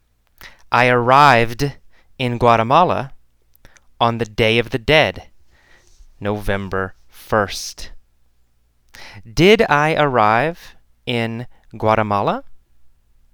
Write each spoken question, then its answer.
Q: Did I arrive in Guatemala?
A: Yes, I arrived in Guatemala.